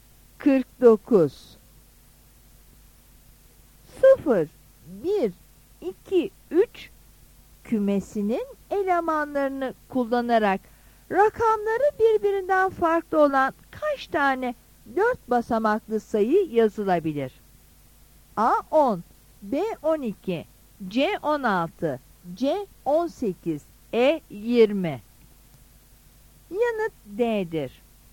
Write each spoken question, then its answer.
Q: 0, 1, 2, 3 kümesinin elemanlarını kullanarak rakamları birbirinden farklı olan kaç tane 4 basamaklı sayı yazılabilir?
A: Yanıt D'dir.